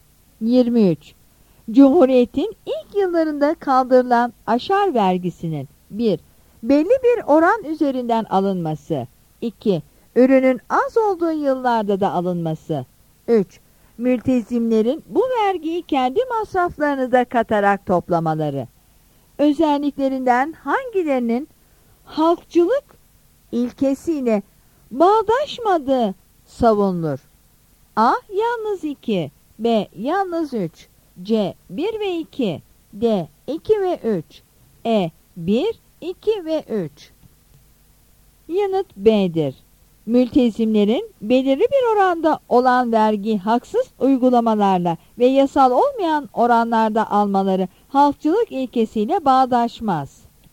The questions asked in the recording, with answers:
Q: Cumhuriyetin ilk yıllarında kaldırılan aşar vergisinin 1. belli bir oran üzerinden alınması. 2. ürünün az olduğu yıllarda da alınması. 3. Mültezimlerin bu vergiyi kendi masraflarını da katarak toplamaları. Özelliklerinden hangilerinin halkçılık ilkesiyle bağdaşmadığı savunulur?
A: Yanıt B'dir.